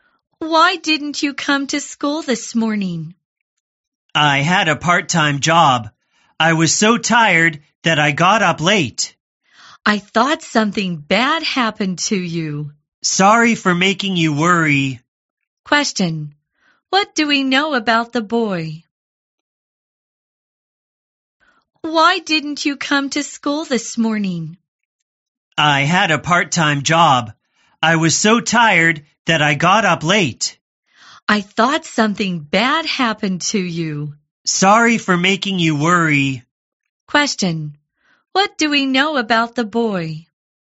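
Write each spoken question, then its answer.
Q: What do we know about the boy?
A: He has a part-time job and got up late.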